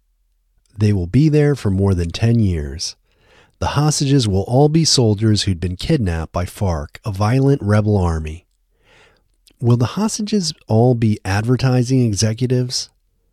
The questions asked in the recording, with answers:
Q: Will the hostages all be advertising executives?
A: No, the hostages won't all be advertising executives.